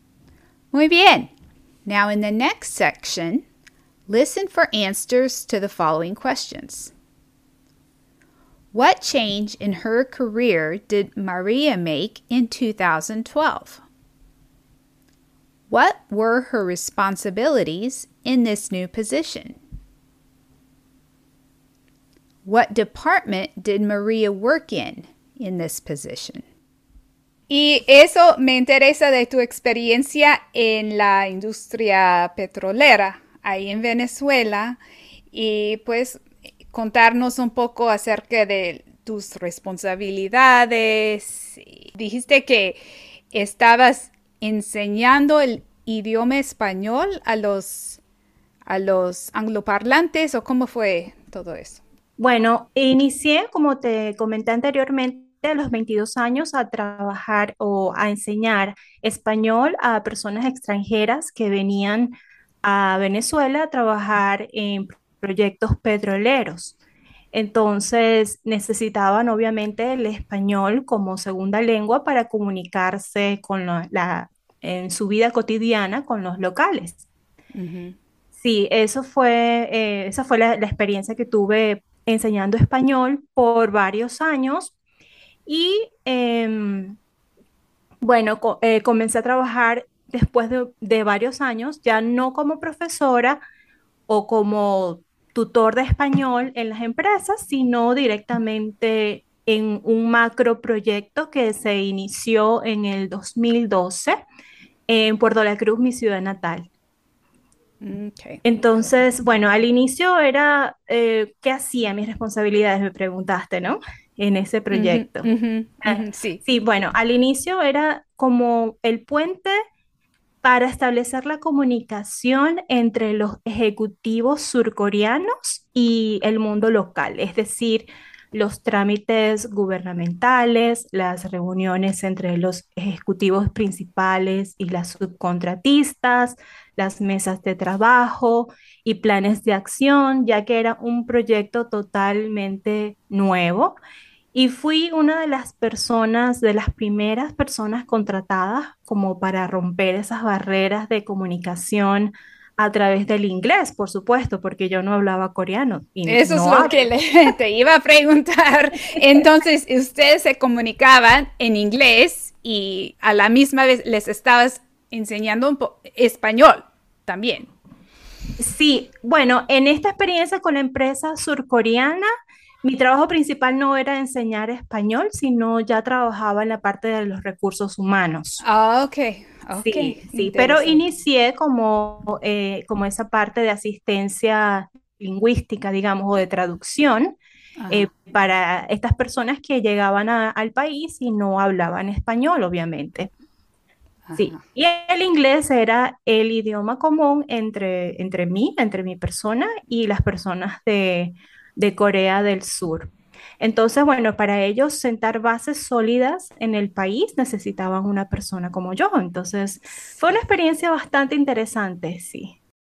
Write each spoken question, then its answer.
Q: What change in her career did Maria make in 2012?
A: Asumió un puesto directo en un macroproyecto con una empresa en su ciudad natal.

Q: What were her responsibilities in this new position?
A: Era como el puente para establecer la comunicación entre los ejecutivos surcoreanos y el mundo local.

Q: What department did Maria work in this position?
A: Ella trabajaba en el área de los recursos humanos.